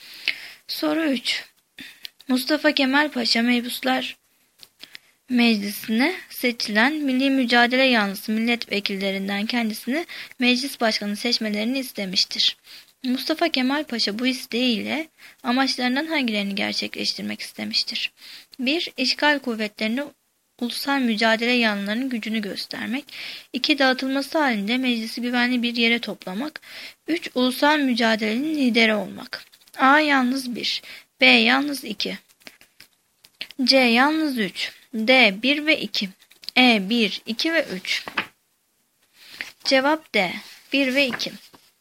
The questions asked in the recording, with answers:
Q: Mustafa Kemal Paşa bu isteğiyle amaçlarından hangilerini gerçekleştirmek istemiştir?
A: Cevap D. 1 ve 2.